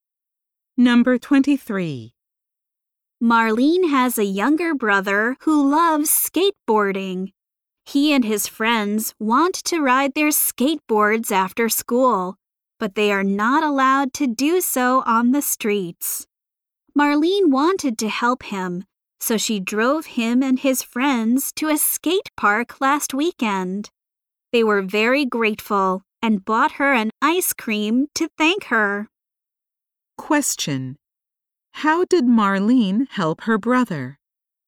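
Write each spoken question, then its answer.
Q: How did Marlene help her brother?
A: She drove him and his friends to a skate park.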